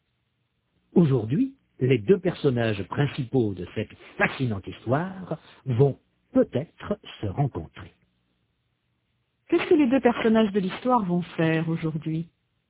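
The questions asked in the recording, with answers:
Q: Qu'est-ce que les deux personnages de l'histoire vont faire aujourd'hui?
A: Ils vont peut-être se rencontrer.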